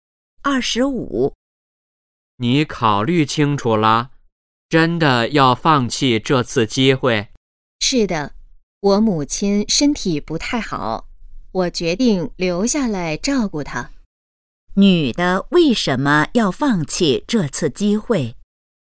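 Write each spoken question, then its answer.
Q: 女的为什么要放弃这次机会?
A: 要照顾母亲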